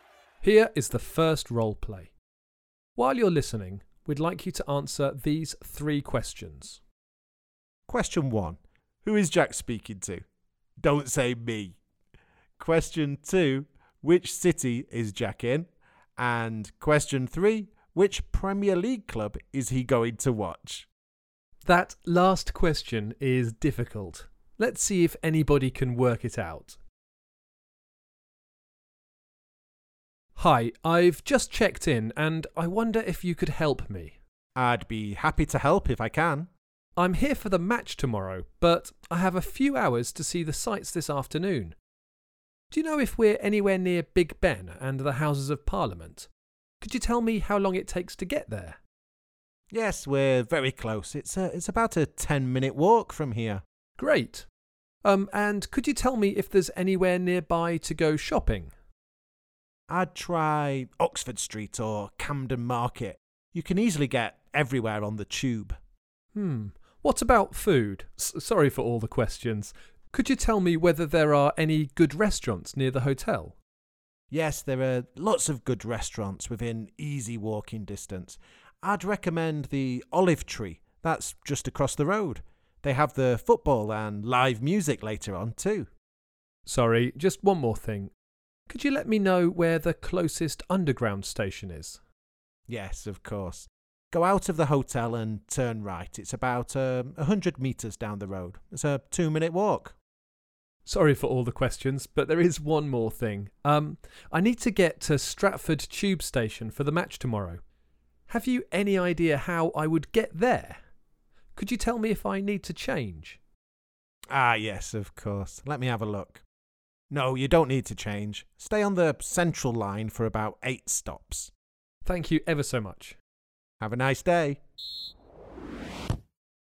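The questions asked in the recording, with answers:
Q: who is Jack speaking to?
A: a hotel receptionist

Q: which city is Jack in?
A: London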